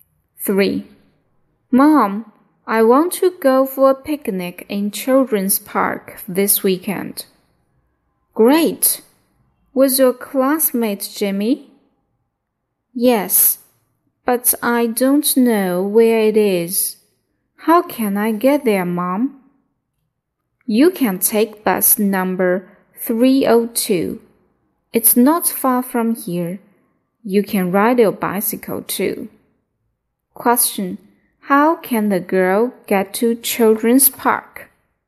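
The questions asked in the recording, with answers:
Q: How can the girl get to Children's Park?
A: By bus number 302 or by bicycle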